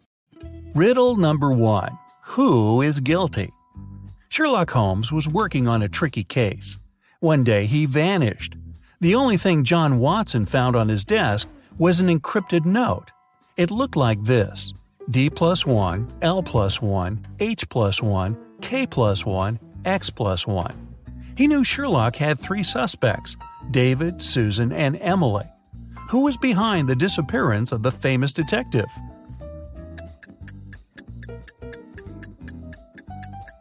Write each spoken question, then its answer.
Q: Who was behind the disappearance of the famous detective?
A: Emily knew where Sherlock was.